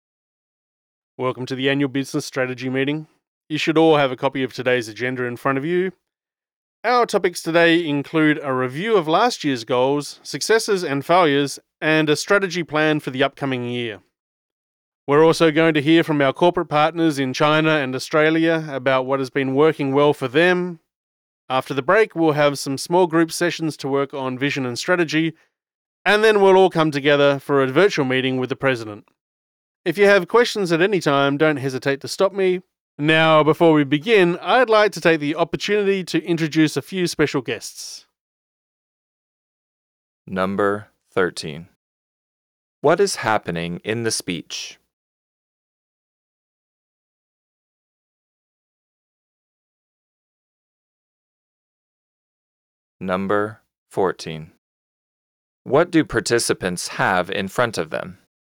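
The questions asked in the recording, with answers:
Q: What is happening in the speech?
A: An annual business strategy meeting

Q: What do participants have in front of them?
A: A copy of today's agenda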